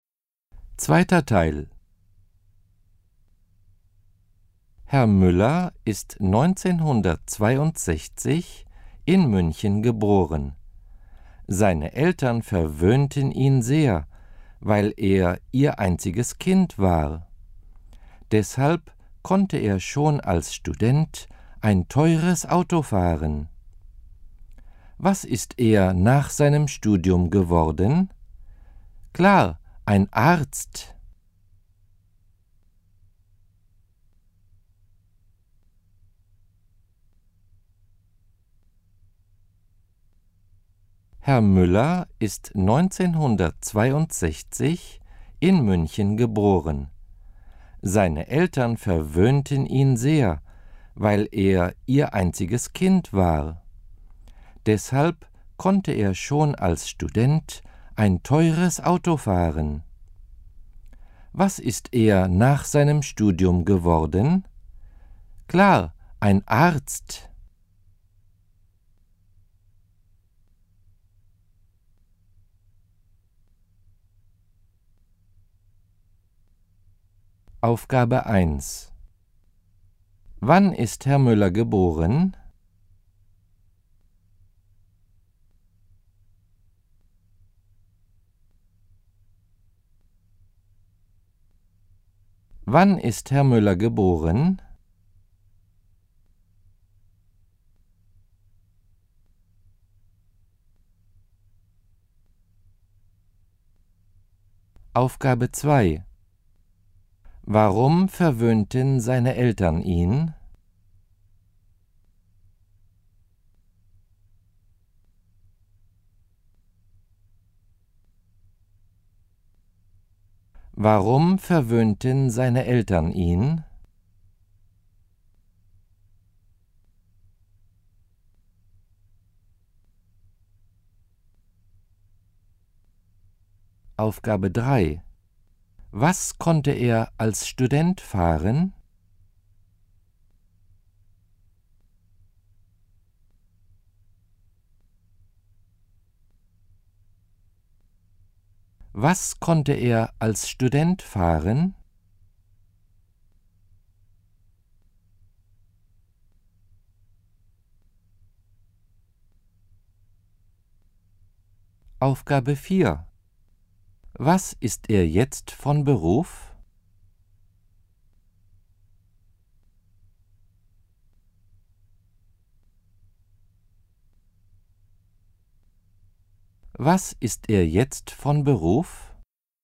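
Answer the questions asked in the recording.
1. 1962
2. Weil er ihr einziges Kind war.
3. Ein teures Auto
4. Arzt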